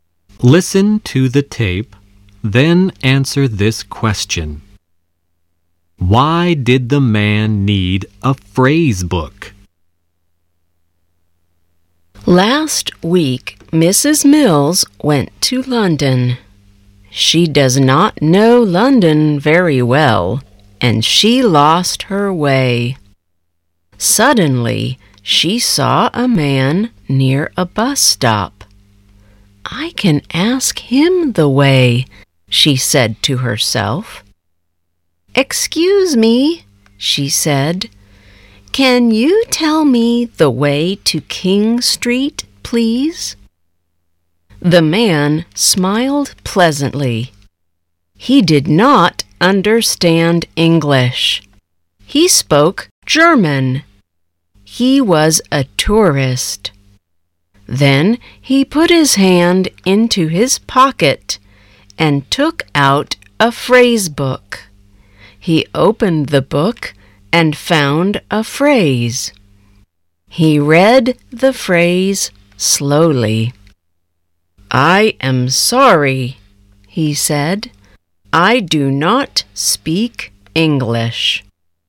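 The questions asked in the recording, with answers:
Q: Why did the man need a phrase book?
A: Because he did not speak English; he was a German tourist.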